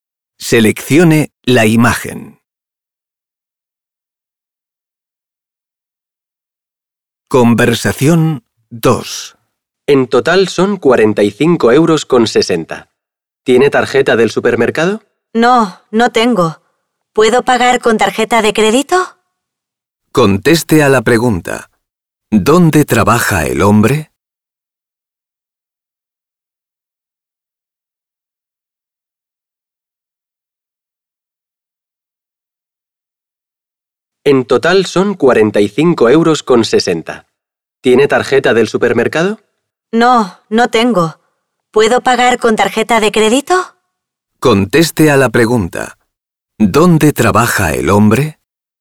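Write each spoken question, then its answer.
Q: ¿Dónde trabaja el hombre?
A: En un supermercado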